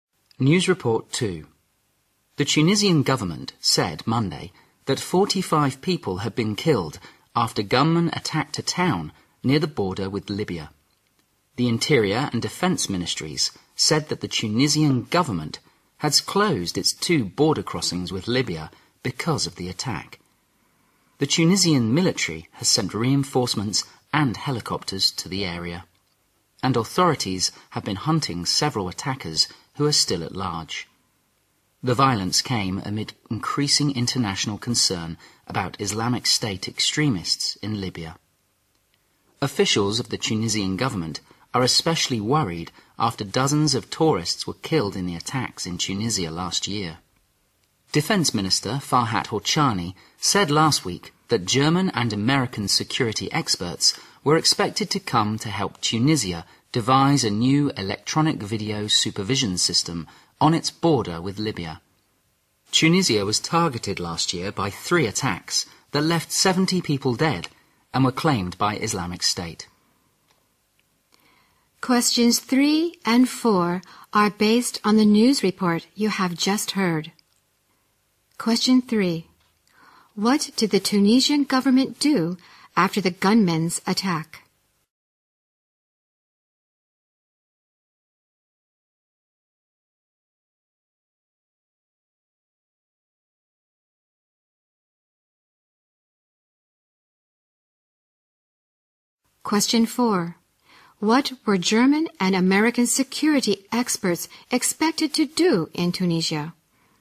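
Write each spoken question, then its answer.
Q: What did the Tunisian government do after the gunmen's attack?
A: It closed its two border crossings with Libya

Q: What were German and American security experts expected to do in Tunisia?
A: Help devise a new electronic video supervision system on the border with Libya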